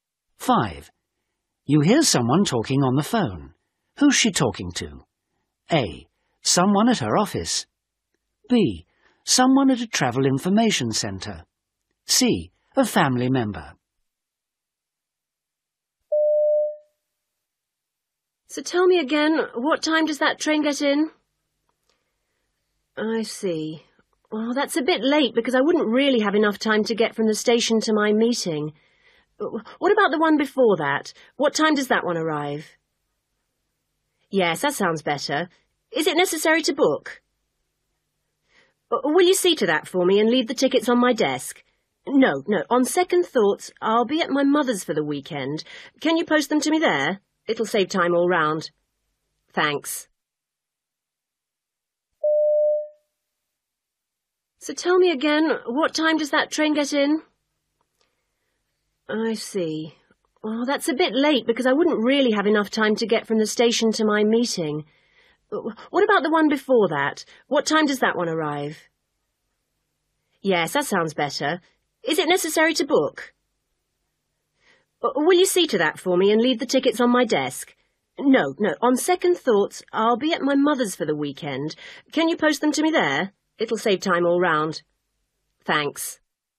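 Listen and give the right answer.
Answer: A: Someone at her office.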